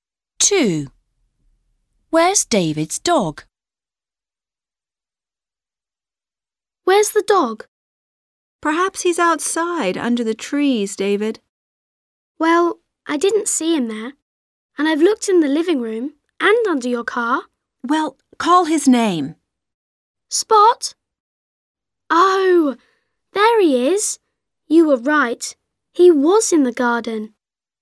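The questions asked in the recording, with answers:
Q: Where's David's dog?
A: Outside under the trees in the garden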